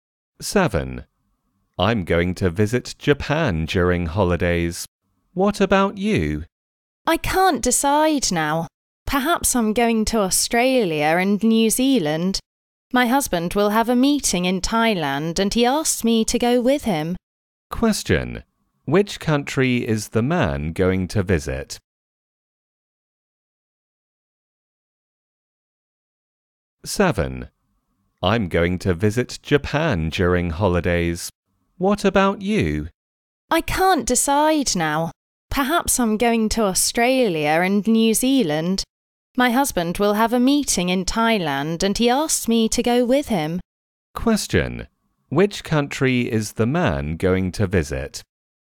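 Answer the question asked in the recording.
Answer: Japan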